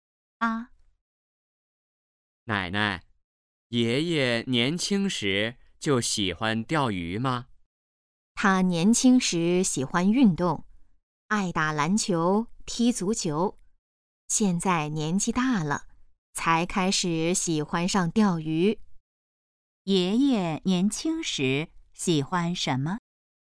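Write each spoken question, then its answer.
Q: 爷爷年轻时喜欢什么?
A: 运动(打篮球、踢足球)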